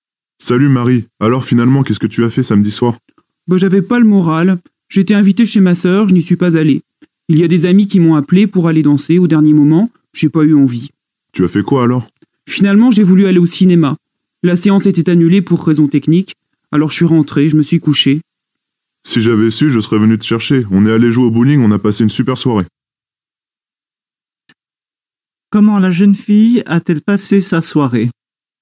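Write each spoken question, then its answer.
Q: Comment la jeune fille a-t-elle passé sa soirée?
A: Elle est rentrée chez elle et s'est couchée (la séance de cinéma était annulée).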